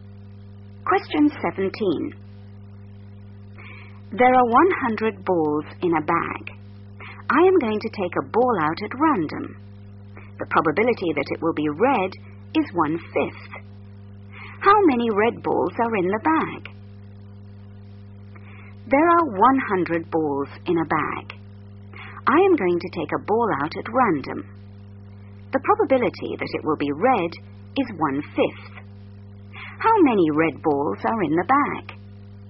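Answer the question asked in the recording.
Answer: 20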